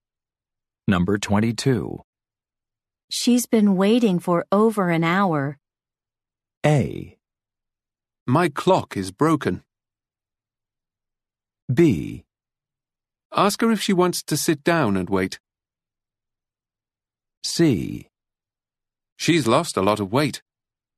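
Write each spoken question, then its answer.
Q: She's been waiting for over an hour.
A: B: Ask her if she wants to sit down and wait.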